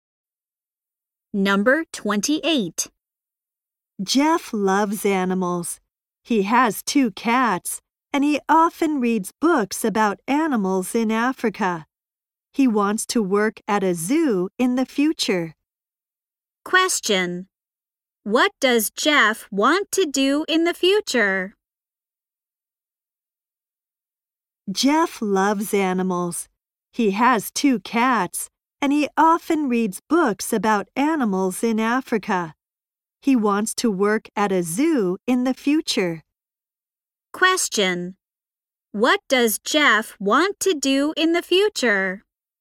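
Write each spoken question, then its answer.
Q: What does Jeff want to do in the future?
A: Work at a zoo.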